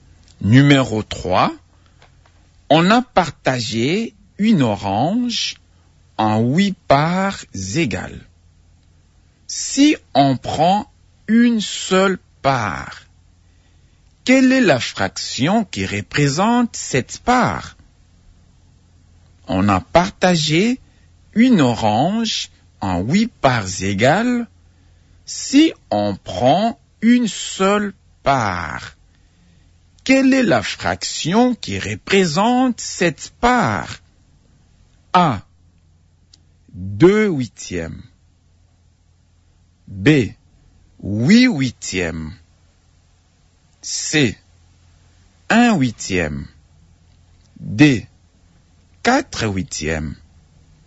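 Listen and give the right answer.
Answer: C: 1/8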